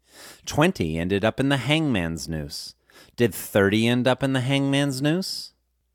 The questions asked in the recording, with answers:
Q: Did 30 end up in the hangman's noose?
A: No, 30 didn't end up in the hangman's noose.